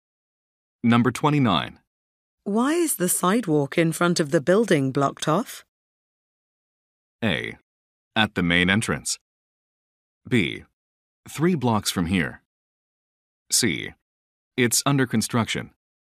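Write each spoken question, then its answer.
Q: Why is the sidewalk in front of the building blocked off?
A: C: It's under construction.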